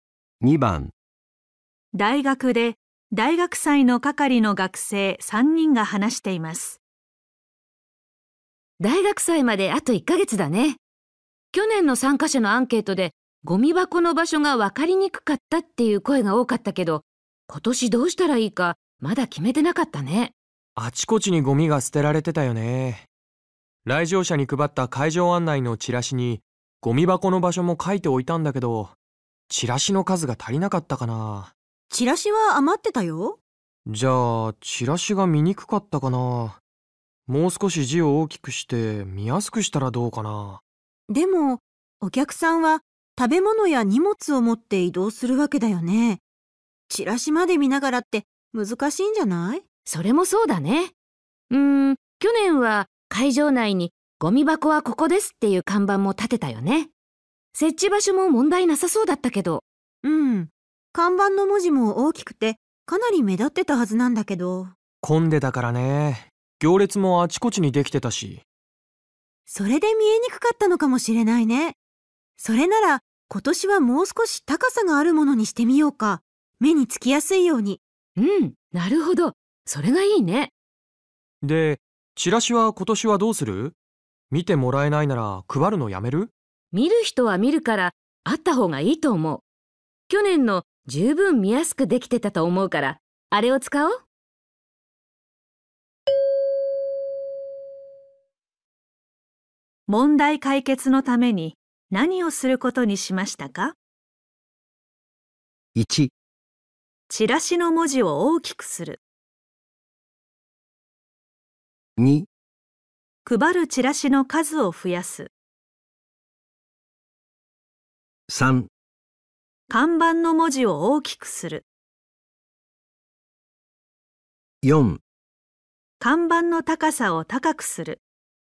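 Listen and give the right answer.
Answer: 4: 看板の高さを高くする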